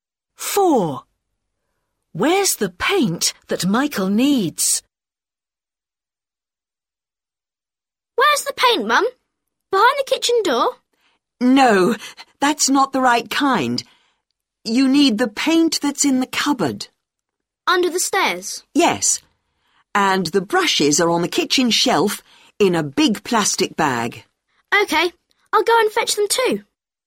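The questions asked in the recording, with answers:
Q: Where's the paint that Michael needs?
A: in the cupboard under the stairs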